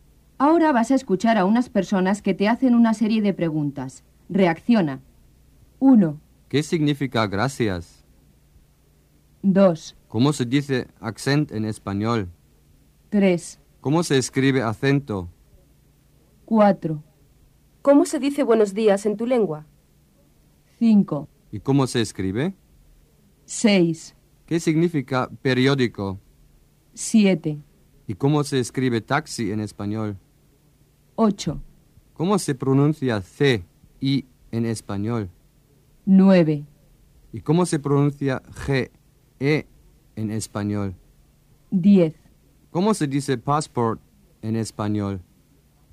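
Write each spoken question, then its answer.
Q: ¿Cómo se dice accent en español?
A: acento

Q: ¿Cómo se escribe acento?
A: A-C-E-N-T-O

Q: ¿Y cómo se escribe taxi en español?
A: T-A-X-I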